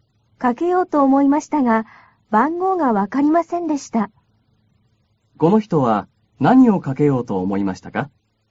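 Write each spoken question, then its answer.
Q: この人は何をかけようと思いましたか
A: 電話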